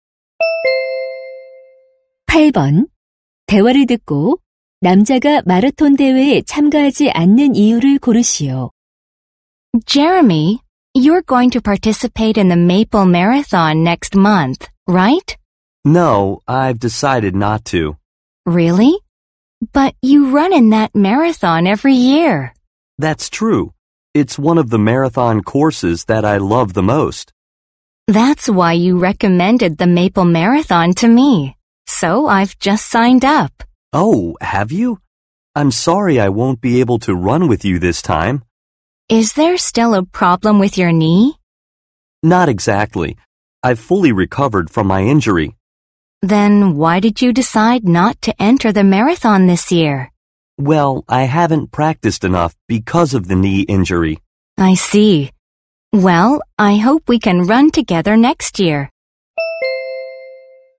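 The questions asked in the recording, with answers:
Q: 대화를 듣고 남자가 마라톤 대회에 참가하지 않는 이유를 고르시오.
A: 무릎 부상 때문에 연습을 충분히 하지 못해서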